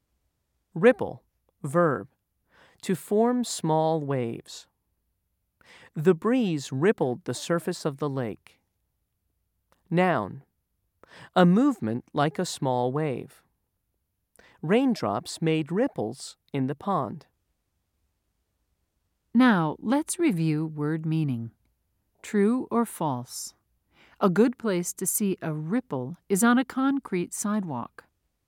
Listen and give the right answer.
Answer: If you said false, you're correct.